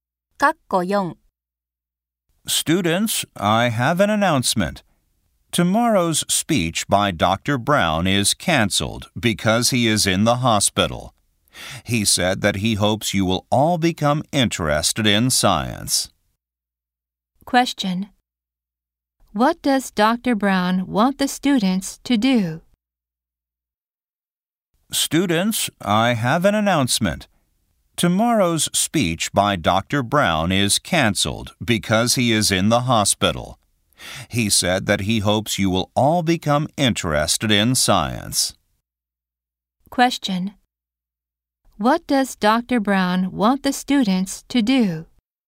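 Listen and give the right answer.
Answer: Become interested in science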